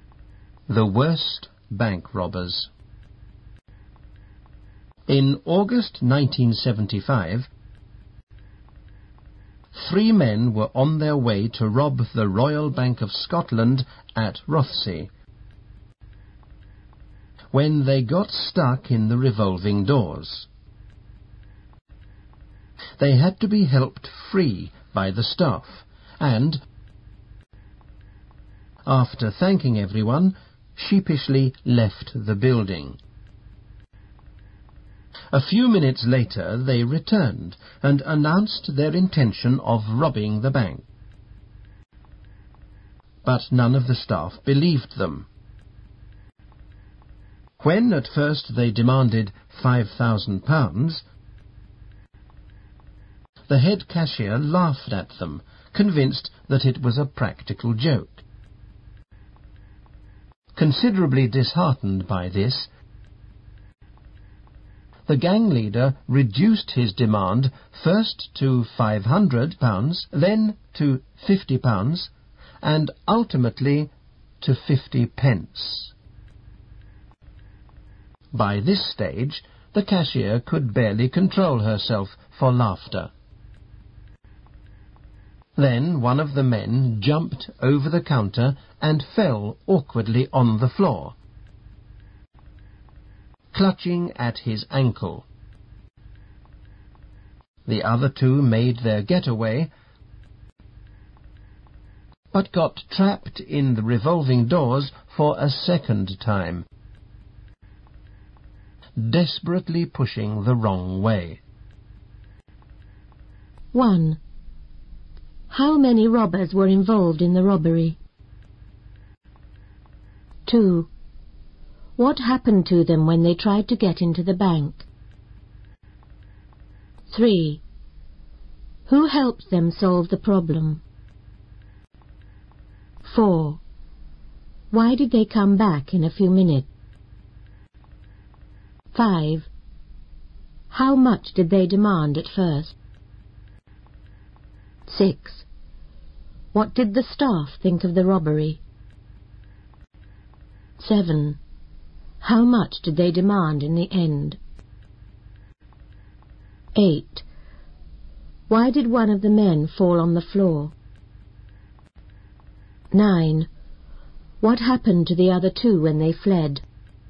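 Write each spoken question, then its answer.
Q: How many robbers were involved in the robbery?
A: Three

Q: What happened to them when they tried to get into the bank?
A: They got stuck in the revolving doors

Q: Who helped them solve the problem?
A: The bank staff

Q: Why did they come back in a few minutes?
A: To rob the bank

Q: How much did they demand at first?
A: £5,000

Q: What did the staff think of the robbery?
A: They thought it was a practical joke

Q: How much did they demand in the end?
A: 50p

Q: Why did one of the men fall on the floor?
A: He jumped over the counter and landed awkwardly

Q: What happened to the other two when they fled?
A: They got trapped in the revolving doors again, pushing the wrong way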